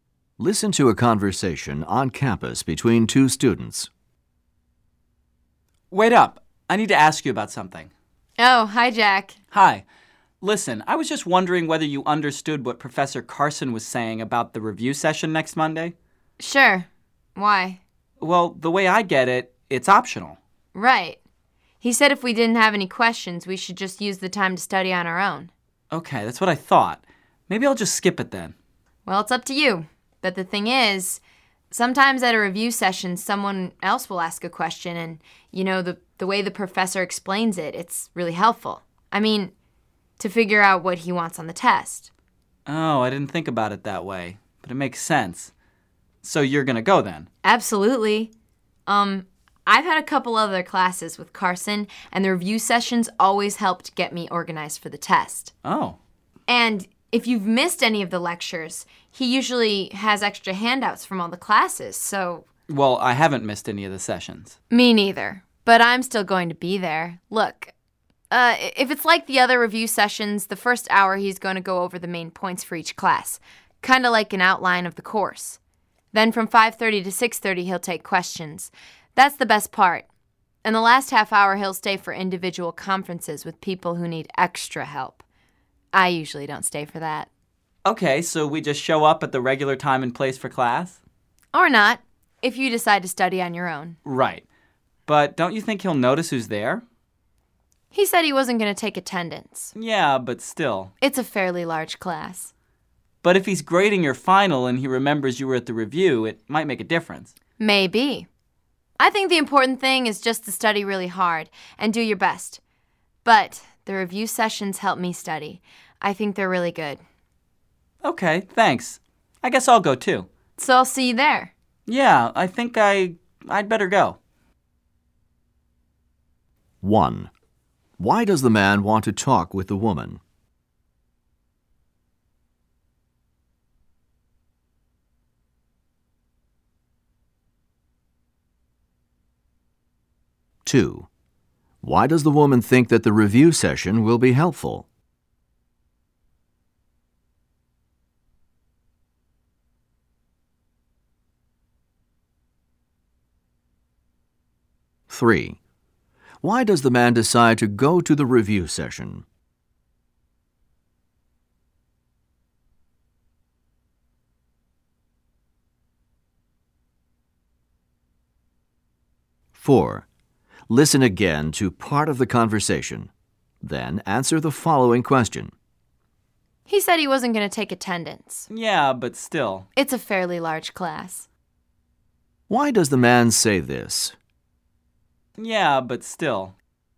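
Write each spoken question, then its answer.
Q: Why does the man want to talk with the woman?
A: To ask what Professor Carson said about the review session

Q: Why does the woman think that the review session will be helpful?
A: The professor's answers to other students' questions show what he wants on the test

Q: Why does the man say this?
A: He thinks the professor may still notice who attends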